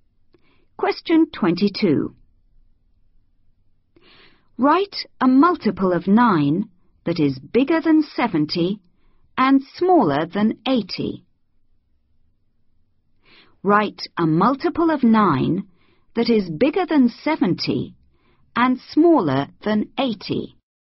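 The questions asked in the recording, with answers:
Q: Write a multiple of 9 that is bigger than 70 and smaller than 80.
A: 72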